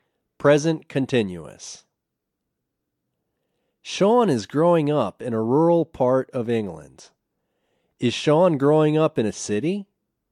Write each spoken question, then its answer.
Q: Is Sean growing up in a city?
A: No, he's not growing up in a city.